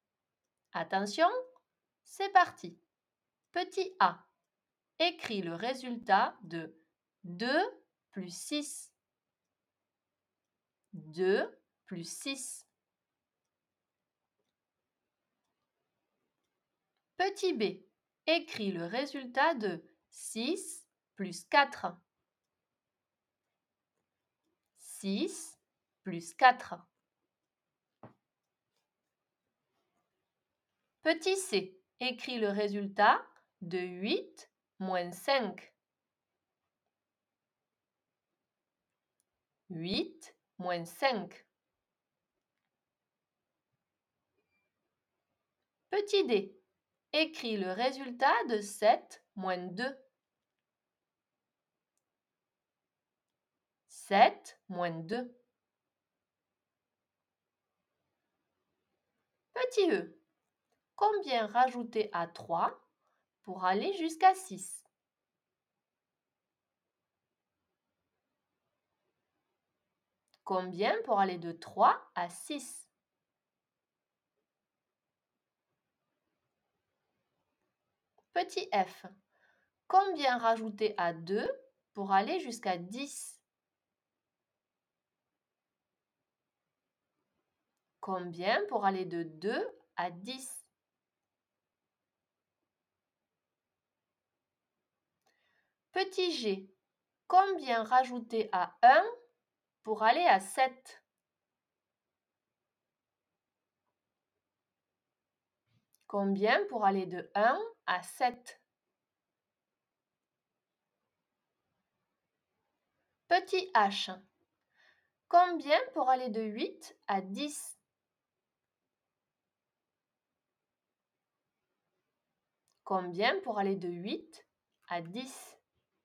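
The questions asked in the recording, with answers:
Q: Petit B, écris le résultat de 6 plus 4.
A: 10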